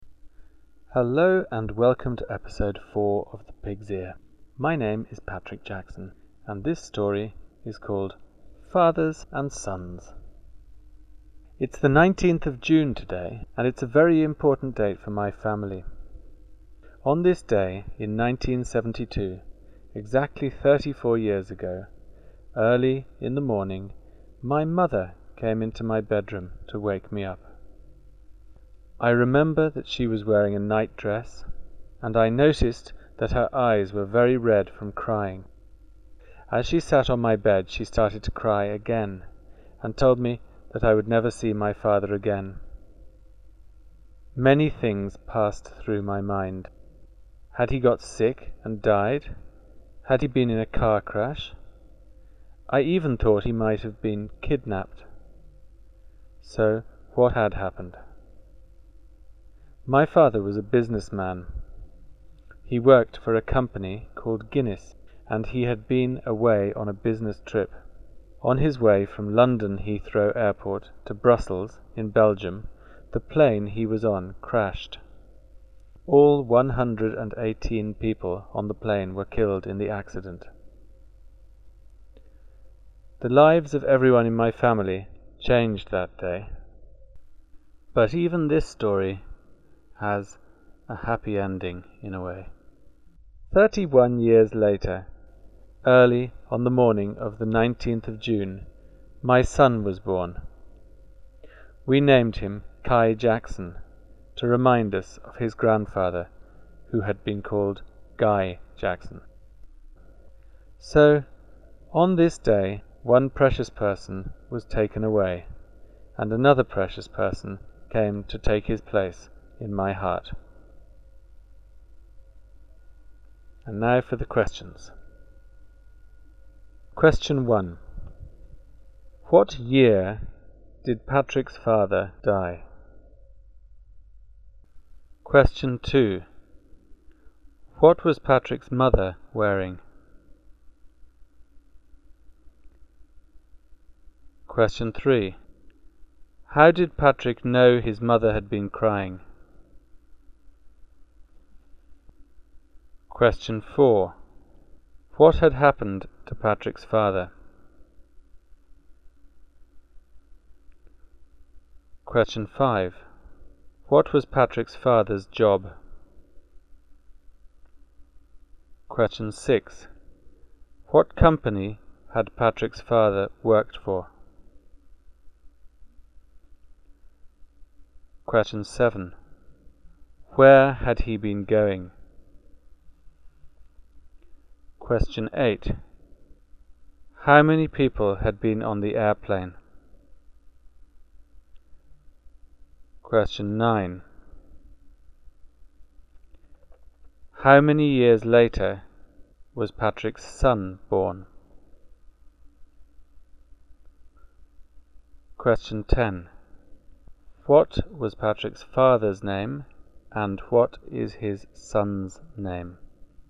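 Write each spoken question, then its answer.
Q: What year did Patrick's father die?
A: 1972

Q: What was Patrick's mother wearing?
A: A nightdress

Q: How did Patrick know his mother had been crying?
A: Her eyes were very red

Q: What had happened to Patrick's father?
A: He was killed in a plane crash

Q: What was Patrick's father's job?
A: Businessman

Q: What company had Patrick's father worked for?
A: Guinness

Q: Where had he been going?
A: Brussels, Belgium

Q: How many people had been on the airplane?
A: 118

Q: How many years later was Patrick's son born?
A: 31 years

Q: What was Patrick's father's name and what is his son's name?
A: Guy Jackson; Kai Jackson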